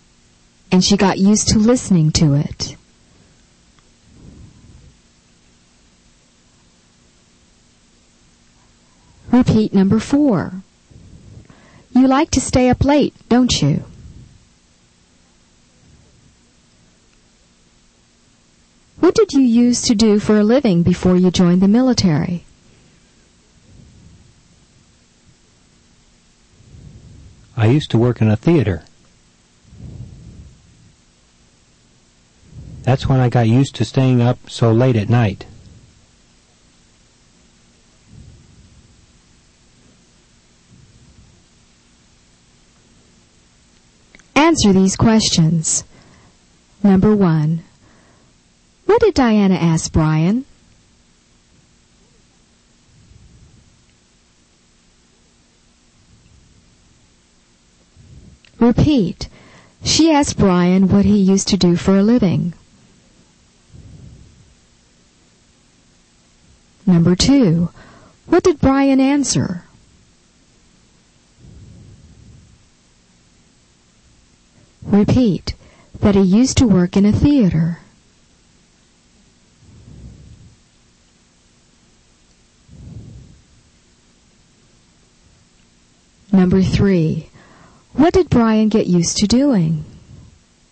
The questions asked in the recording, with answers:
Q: what did Diana ask Brian?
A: She asked Brian what he used to do for a living.

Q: what did Brian answer?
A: that he used to work in a theater.

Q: what did Brian get used to doing?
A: he got used to staying up late at night.